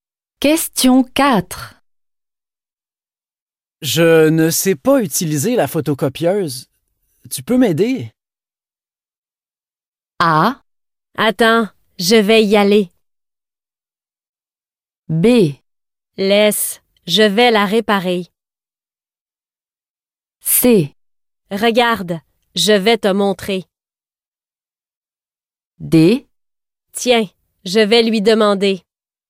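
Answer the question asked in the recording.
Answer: C: Regarde, je vais te montrer.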